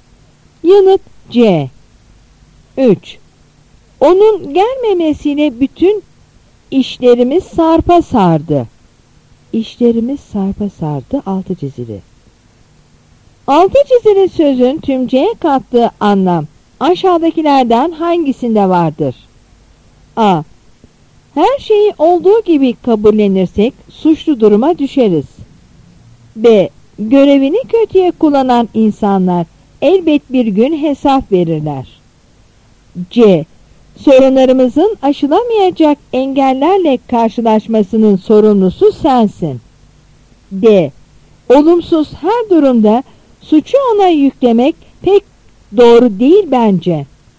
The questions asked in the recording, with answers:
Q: Altı çizili sözün tümceye kattığı anlam aşağıdakilerden hangisinde vardır?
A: Yanıt C.